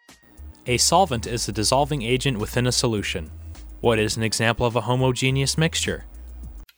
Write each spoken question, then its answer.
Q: What is an example of a homogeneous mixture?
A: Hot cocoa with no marshmallows is an example of a homogeneous mixture.